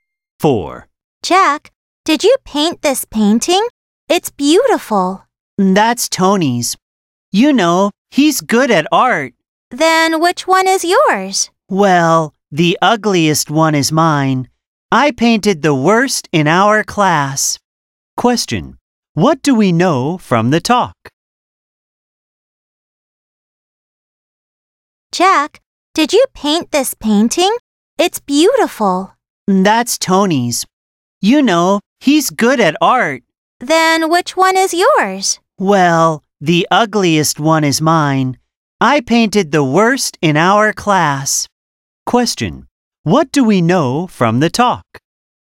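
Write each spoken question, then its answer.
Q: What do we know from the talk?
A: Jack's painting was the worst in the class; Tony is good at art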